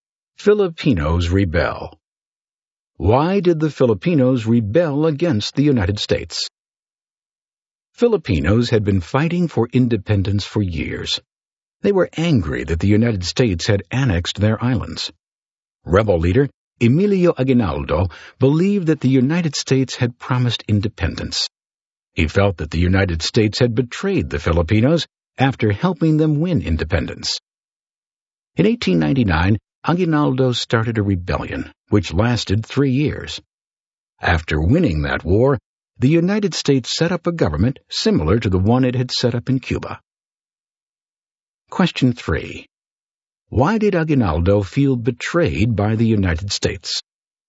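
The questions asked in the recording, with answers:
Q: Why did Aguinaldo feel betrayed by the United States?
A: He believed the U.S. had promised independence, but it annexed the islands instead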